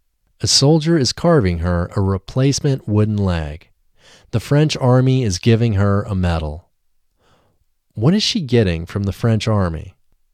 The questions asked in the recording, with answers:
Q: What is she getting from the French army?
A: She is getting a medal from the French army.